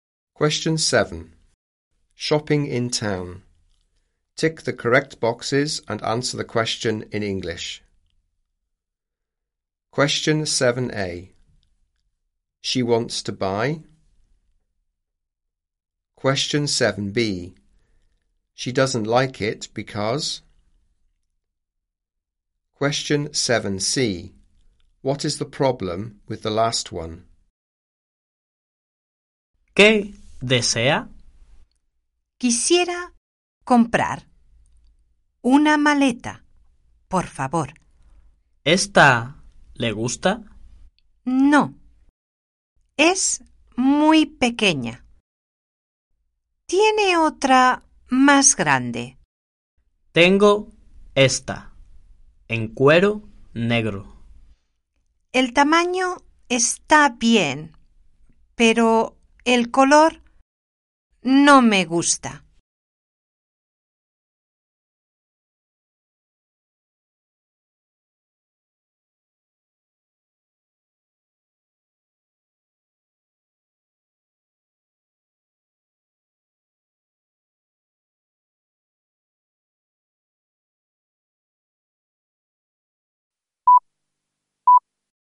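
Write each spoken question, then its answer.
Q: What is the problem with the last one?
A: She doesn't like the colour (black)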